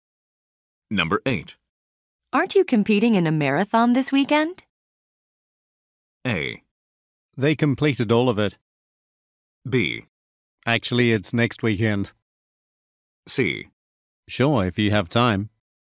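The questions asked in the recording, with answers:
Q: Aren't you competing in a marathon this weekend?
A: B: Actually, it's next weekend.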